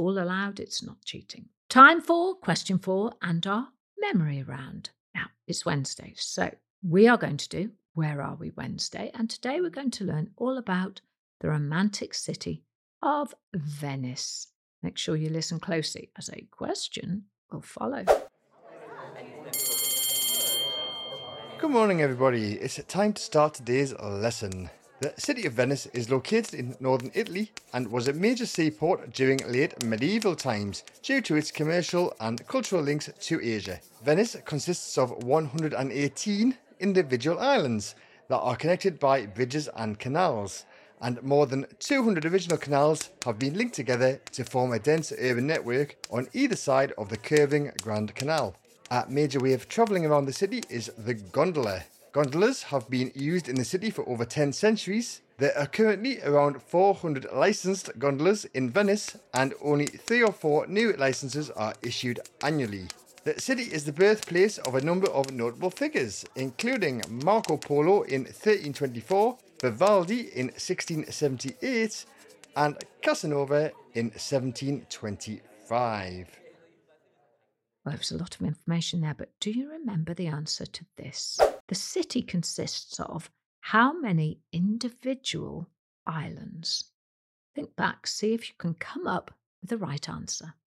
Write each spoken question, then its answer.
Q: The city consists of how many individual islands?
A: The city, Venice, consists of 118 individual islands.